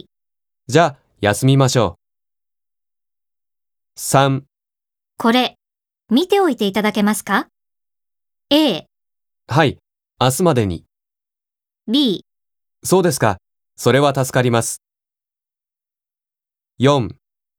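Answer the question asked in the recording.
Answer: A: はい、明日までに。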